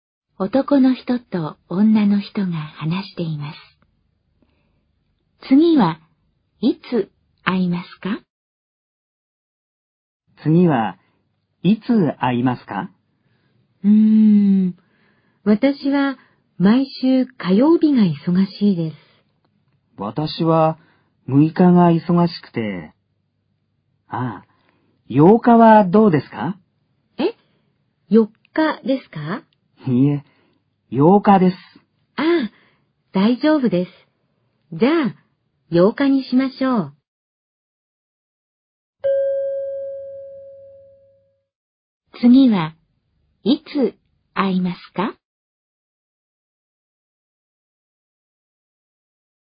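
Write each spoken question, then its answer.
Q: 次はいつ会いますか?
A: 8日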